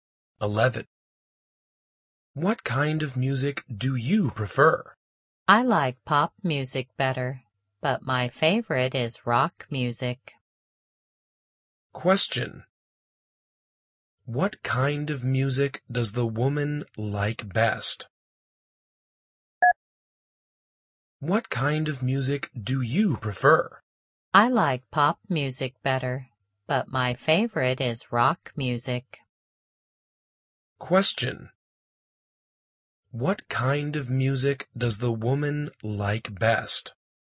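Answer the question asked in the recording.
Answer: Rock music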